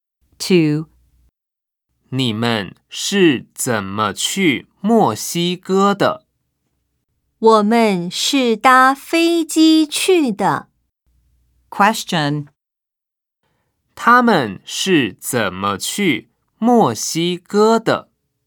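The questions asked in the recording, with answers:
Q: 他们是怎么去墨西哥的?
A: 搭飞机去的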